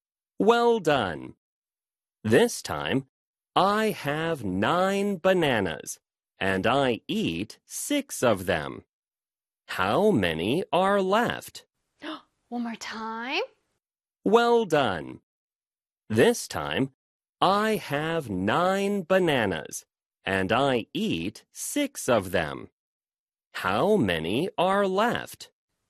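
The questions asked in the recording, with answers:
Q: How many are left?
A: Three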